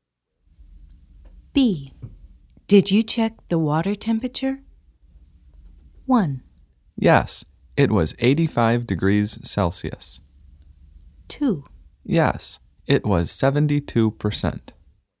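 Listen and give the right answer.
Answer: 1: Yes, it was 85 degrees Celsius.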